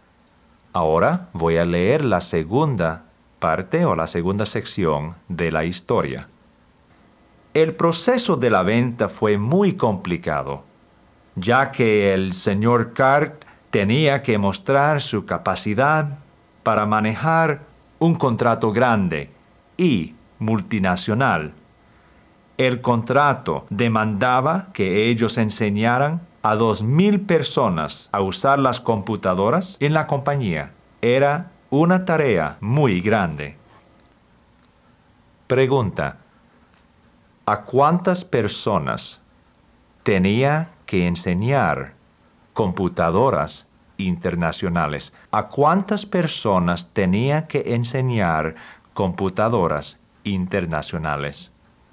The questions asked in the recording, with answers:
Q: ¿a cuántas personas tenía que enseñar computadoras internacionales?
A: A 2,000 personas.